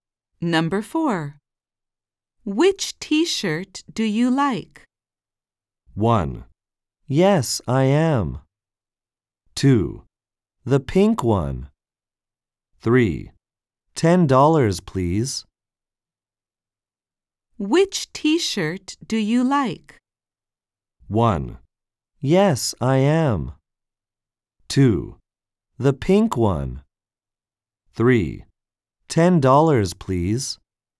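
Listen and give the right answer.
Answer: 2: The pink one.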